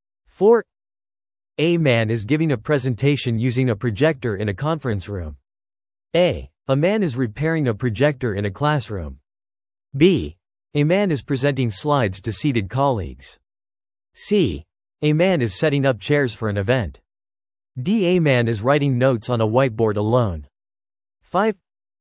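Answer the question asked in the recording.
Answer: B: A man is presenting slides to seated colleagues.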